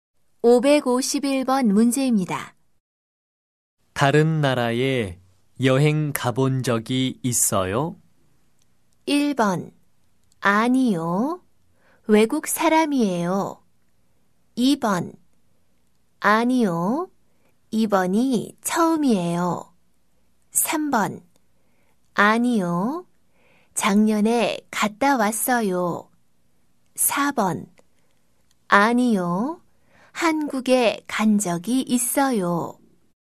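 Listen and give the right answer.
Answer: 2: 아니요. 이번이 처음이에요.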